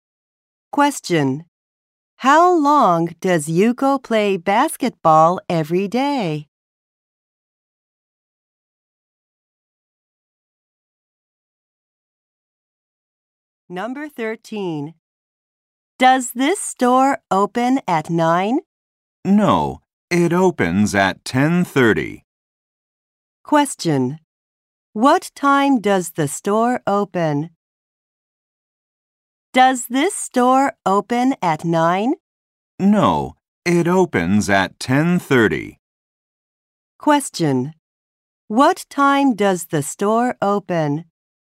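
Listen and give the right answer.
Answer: At 10:30.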